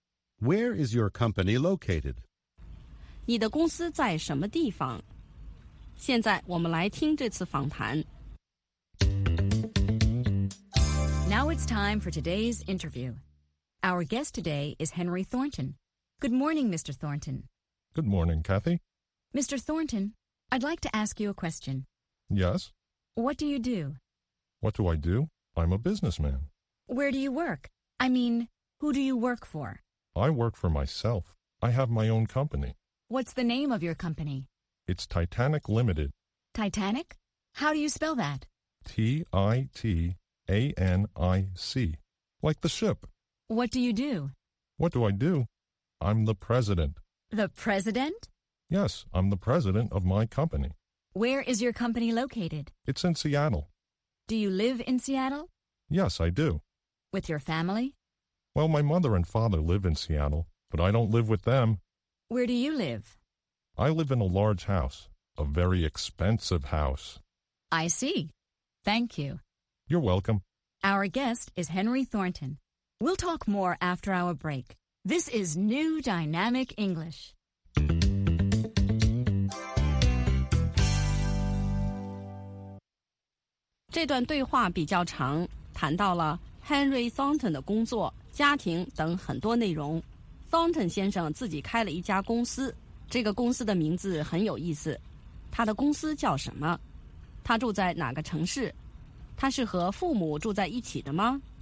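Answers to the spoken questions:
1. Henry 的公司叫 Titanic Limited
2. 西雅图(Seattle)
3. 不是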